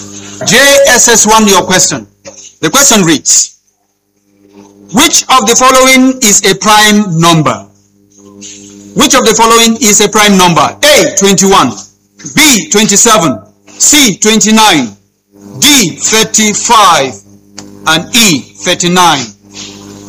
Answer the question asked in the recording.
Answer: 29.